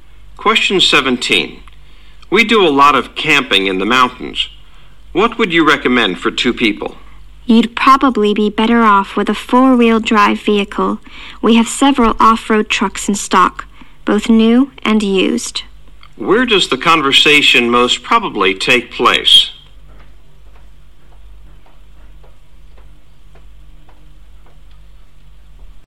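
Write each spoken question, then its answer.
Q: Where does the conversation most probably take place?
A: At a car dealership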